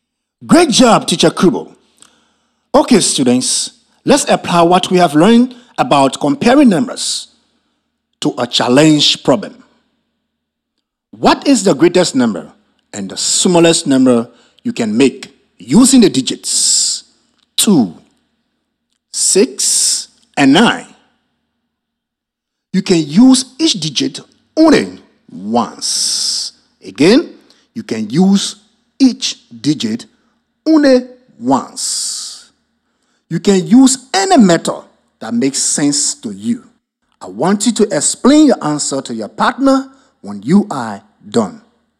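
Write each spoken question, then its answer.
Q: What is the greatest number and the smallest number you can make using the digits 2, 6, and 9?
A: Greatest 962, smallest 269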